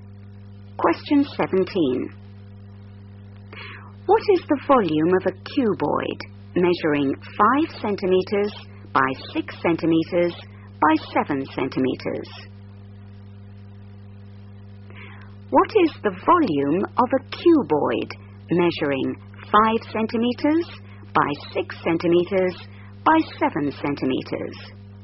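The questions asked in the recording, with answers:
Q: What is the volume of a cuboid measuring 5 centimetres by 6 centimetres by 7 centimetres?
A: 210 cm3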